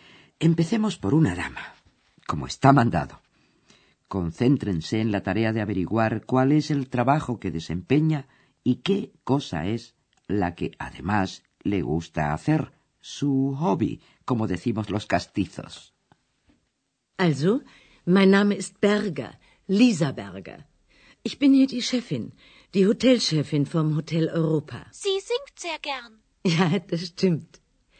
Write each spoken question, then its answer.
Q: Concéntrense en la tarea de averiguar cuál es el trabajo que desempeña y qué cosa es la que además le gusta hacer, su hobby, como decimos los castizos.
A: Así pues, esta era la señora Berger, directora del Hotel Europa